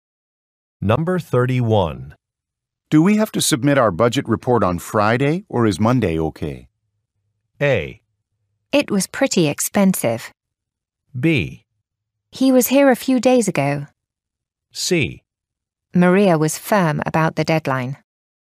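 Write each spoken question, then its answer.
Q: Do we have to submit our budget report on Friday, or is Monday okay?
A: C: Maria was firm about the deadline.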